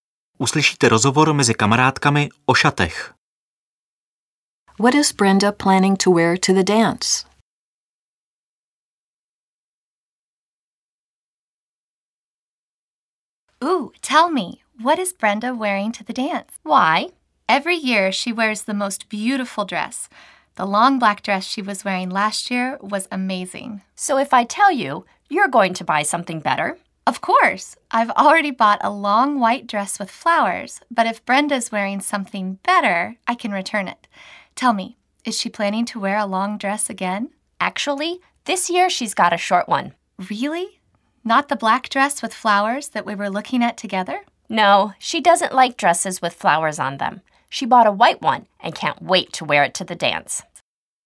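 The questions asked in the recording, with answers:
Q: What is Brenda planning to wear to the dance?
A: A short white dress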